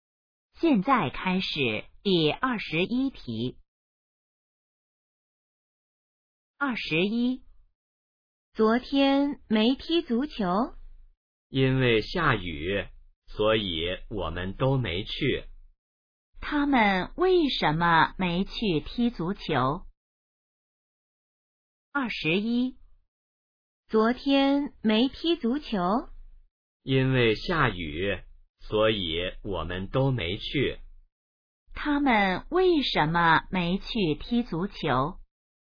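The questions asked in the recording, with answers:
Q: 他们为什么没去踢足球?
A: 因为下雨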